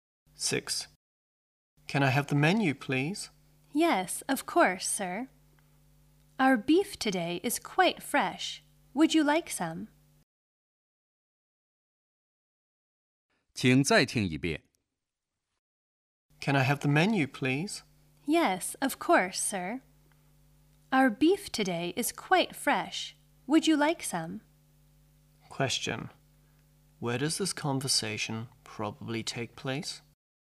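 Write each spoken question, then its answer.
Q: Where does this conversation probably take place?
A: In a restaurant.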